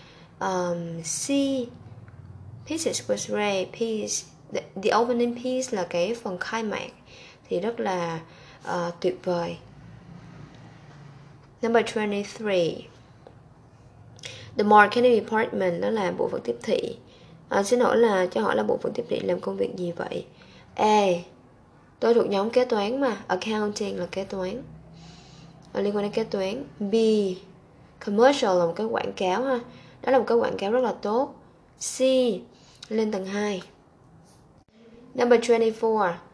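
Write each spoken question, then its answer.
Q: Xin lỗi là cho hỏi là bộ phận tiếp thị làm công việc gì vậy?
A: A: Tôi thuộc nhóm kế toán mà.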